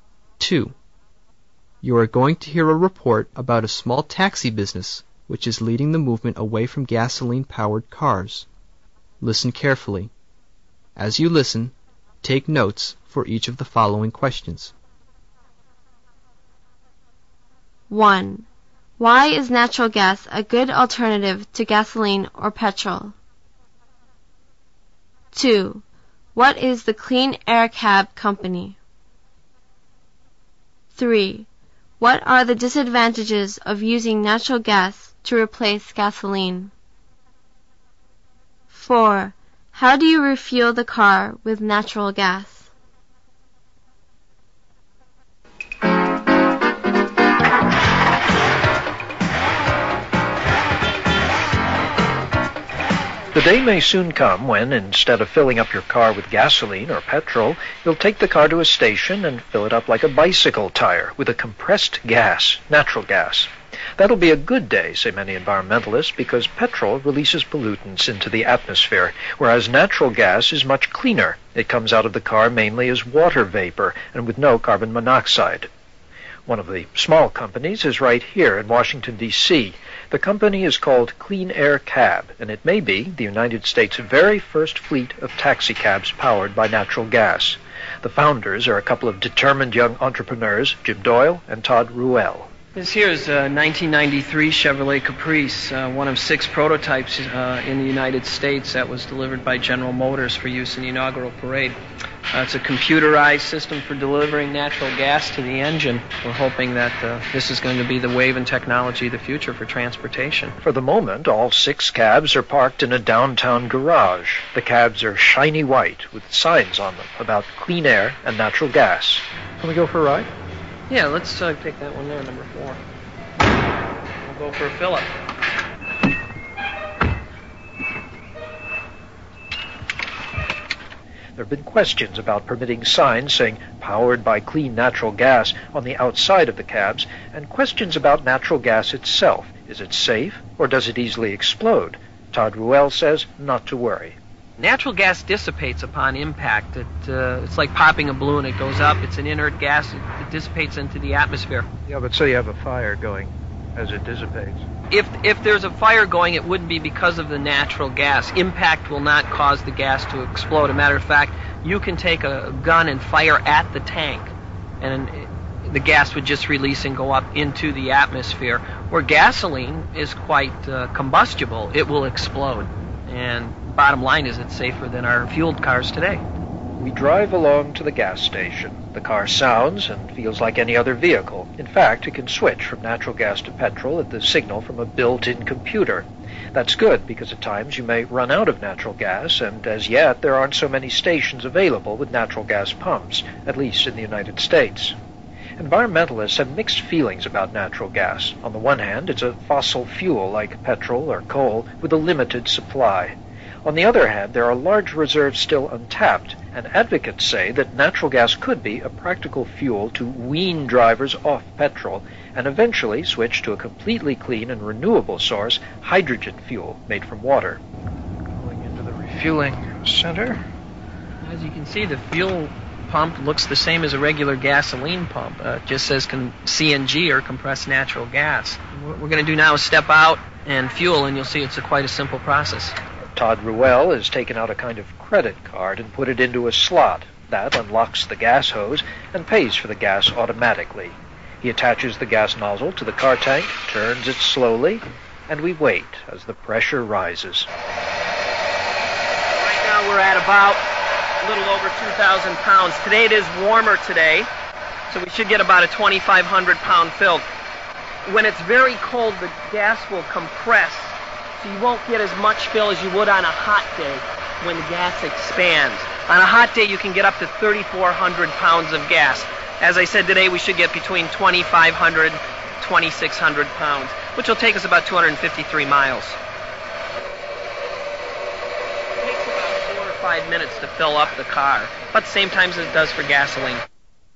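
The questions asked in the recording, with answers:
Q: Why is natural gas a good alternative to gasoline or petrol?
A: It is much cleaner: it comes out of the car mainly as water vapor, with no carbon monoxide, while petrol releases pollutants.

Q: What is the Clean Air Cab Company?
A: A small taxi company in Washington, D.C., perhaps the first US fleet of taxicabs powered by natural gas.

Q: What are the disadvantages of using natural gas to replace gasoline?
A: It is a fossil fuel with a limited supply, and there are not many stations with natural gas pumps yet.

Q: How do you refuel the car with natural gas?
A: Put a card into a slot to unlock the hose and pay, attach the nozzle to the car tank and wait as the pressure rises. It takes about 4 or 5 minutes.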